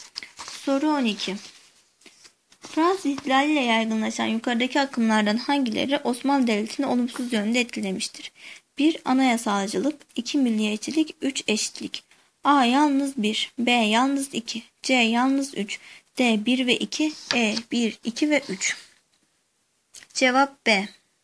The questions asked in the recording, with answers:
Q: Fransız ihtilaliyle yaygınlaşan yukarıdaki akımlardan hangileri Osmanlı Devleti'ni olumsuz yönde etkilemiştir?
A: Cevap B.